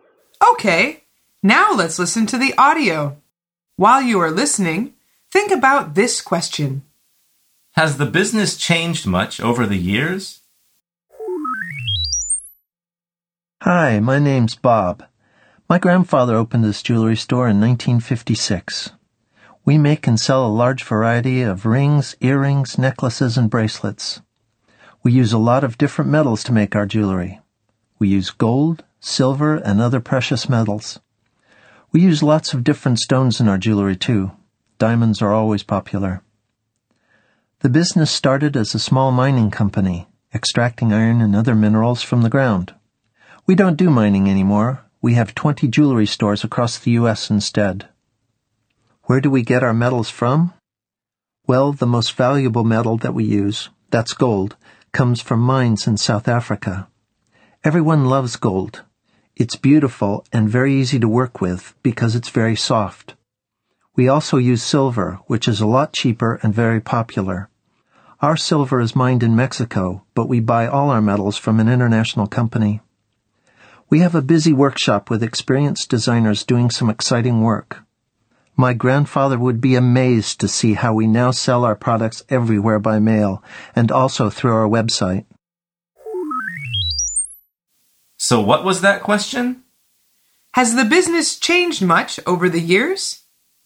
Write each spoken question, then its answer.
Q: Has the business changed much over the years?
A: The answer is yes, it has.